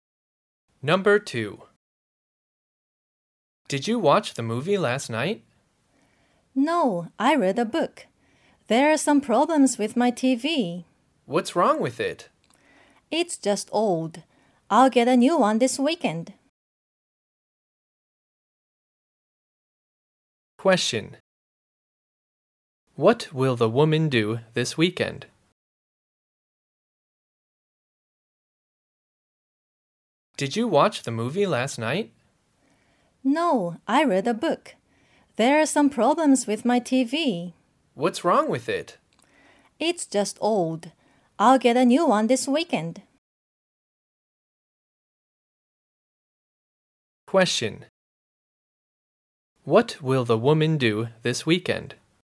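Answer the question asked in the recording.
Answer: Get a new TV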